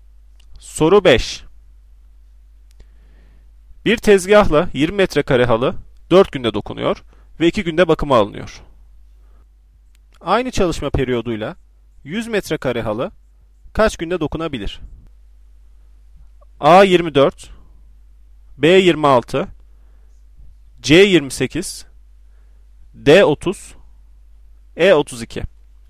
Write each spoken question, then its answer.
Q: Aynı çalışma periyoduyla 100 metrekare halı kaç günde dokunabilir?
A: Doğru cevap C 28.